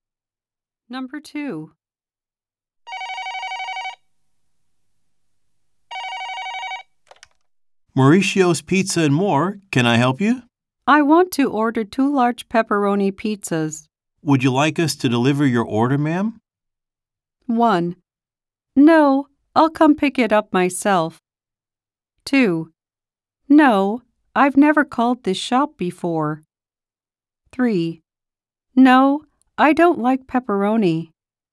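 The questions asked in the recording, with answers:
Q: Would you like us to deliver your order, ma'am?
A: 1: No, I'll come pick it up myself.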